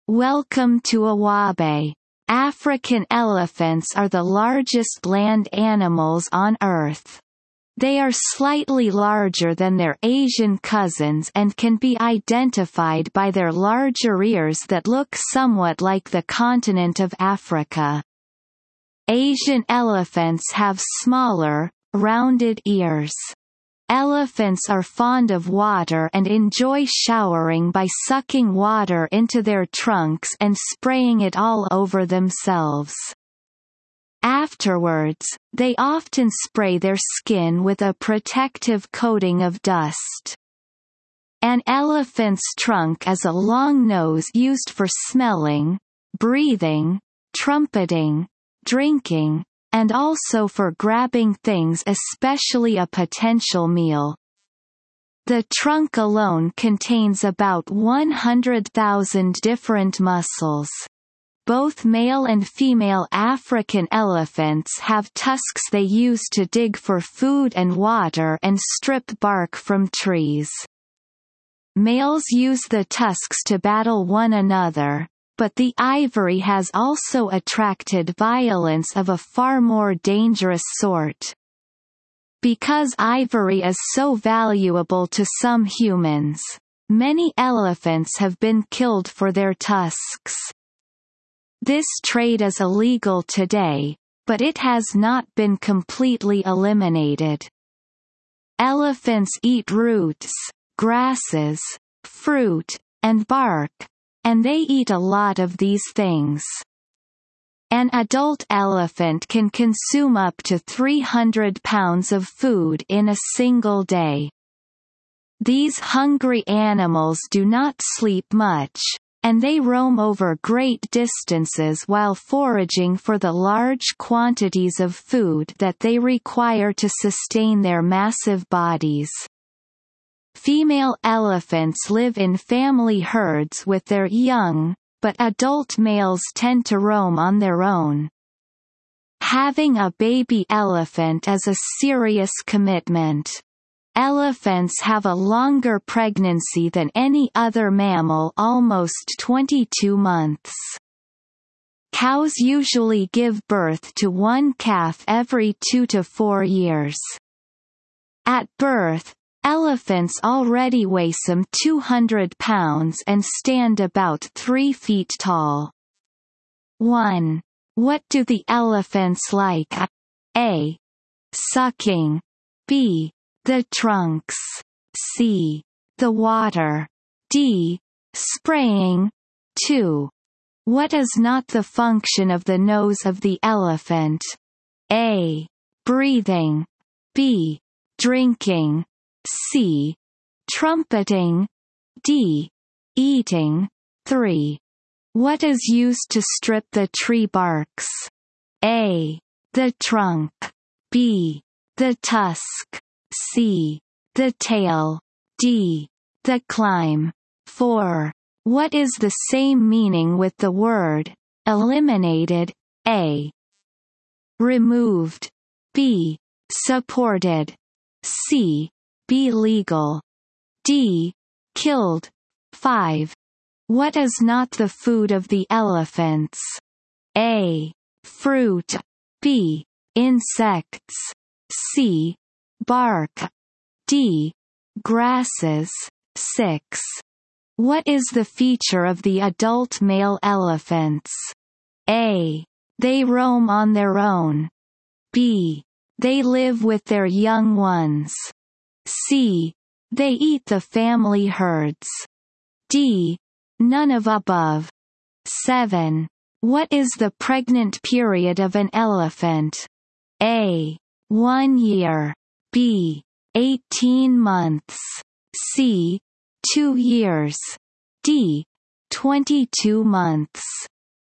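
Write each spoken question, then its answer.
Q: What do the elephants like?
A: C: The water.

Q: What is used to strip the tree barks?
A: B: The tusk.

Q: What is the same meaning with the word eliminated?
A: A: Removed.

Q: What is not the food of the elephants?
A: B: Insects.

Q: What is the feature of the adult male elephants?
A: A: They roam on their own.

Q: What is the pregnant period of an elephant?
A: D: 22 months.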